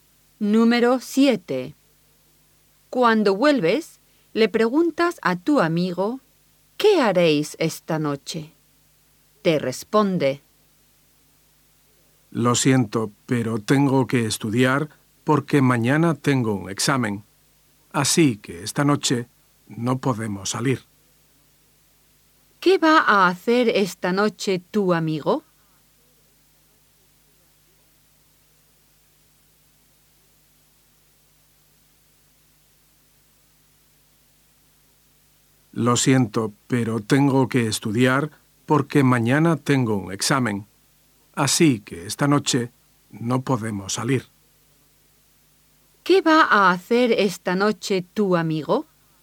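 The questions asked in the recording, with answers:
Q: ¿Qué va a hacer esta noche tu amigo?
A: Estudiar para un examen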